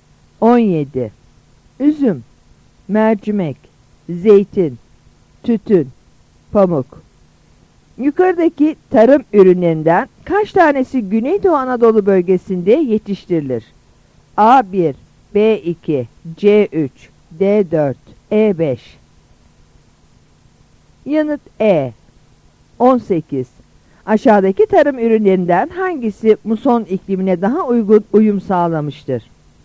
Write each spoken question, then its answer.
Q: Yukarıdaki tarım ürünlerinden kaç tanesi Güneydoğu Anadolu bölgesinde yetiştirilir?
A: Yanıt E.